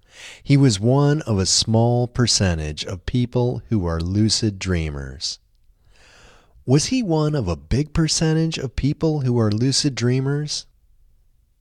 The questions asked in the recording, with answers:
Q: Was he one of a big percentage of people who are lucid dreamers?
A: No, he wasn't one of a big percentage of people who are lucid dreamers.